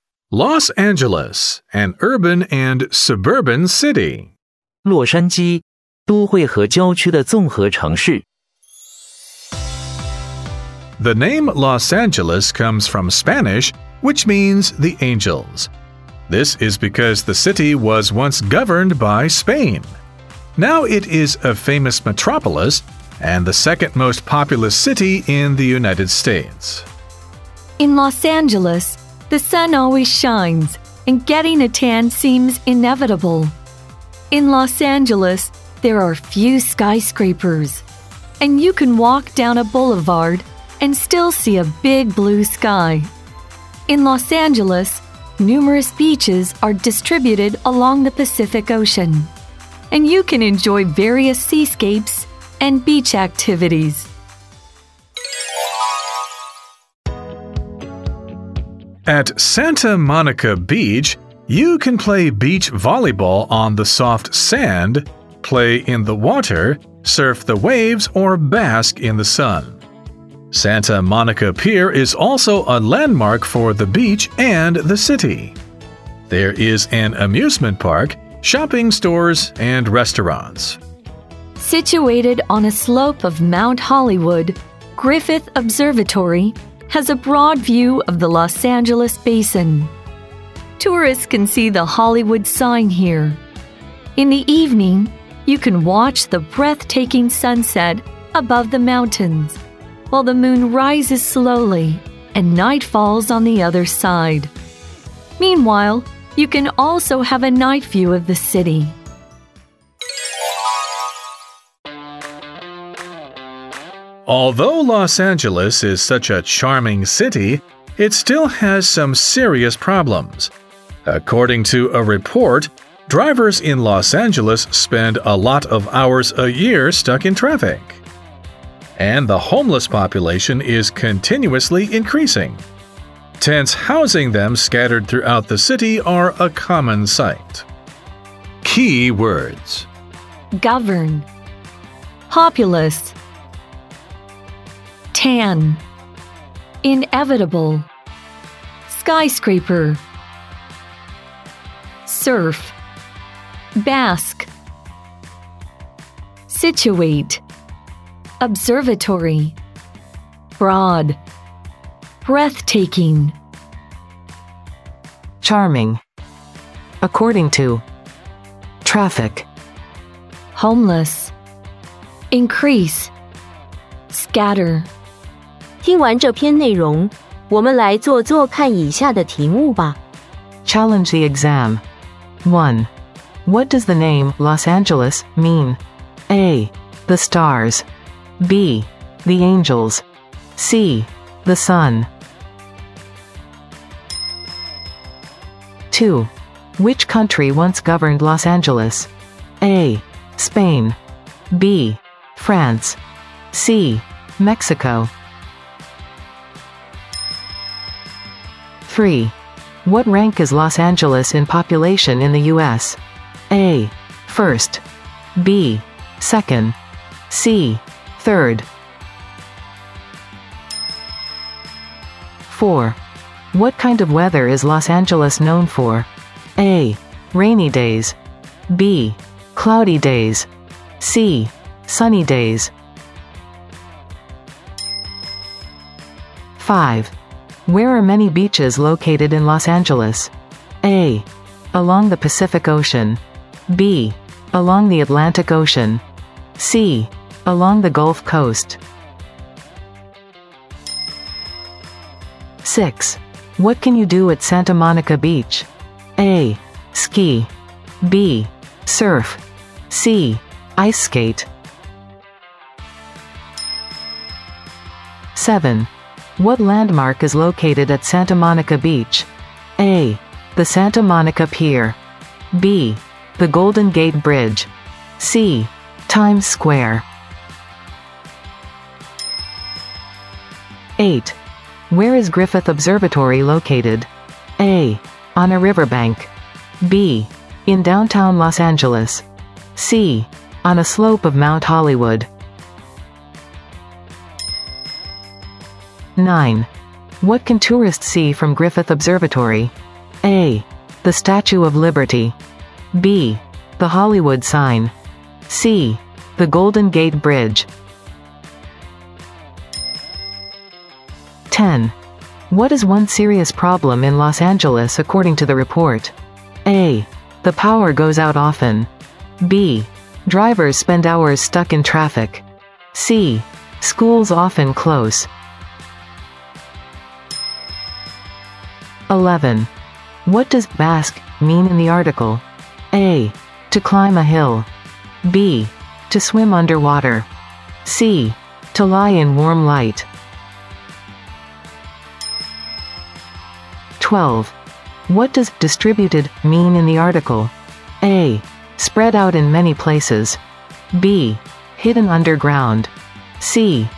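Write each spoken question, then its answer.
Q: What does the name Los Angeles mean?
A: B: The angels.

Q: Which country once governed Los Angeles?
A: A: Spain.

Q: What rank is Los Angeles in population in the U.S.?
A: B: Second.

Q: What kind of weather is Los Angeles known for?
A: C: Sunny days.

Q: Where are many beaches located in Los Angeles?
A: A: Along the Pacific Ocean.

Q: What can you do at Santa Monica Beach?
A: B: Surf.

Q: What landmark is located at Santa Monica Beach?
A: A: The Santa Monica Pier.

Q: Where is Griffith Observatory located?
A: C: On a slope of Mount Hollywood.

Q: What can tourists see from Griffith Observatory?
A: B: The Hollywood Sign.

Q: What is one serious problem in Los Angeles according to the report?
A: B: Drivers spend hours stuck in traffic.

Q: What does Basque mean in the article?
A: C: To lie in warm light.

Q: What does distributed mean in the article?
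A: A: Spread out in many places.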